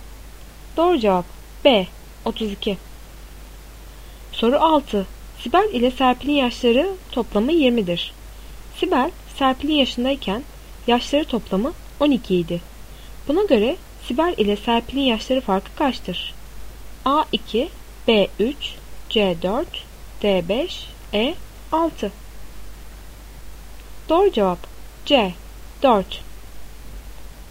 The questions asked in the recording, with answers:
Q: Buna göre Sibel ile Serpil'in yaşları farkı kaçtır?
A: Doğru cevap C 4.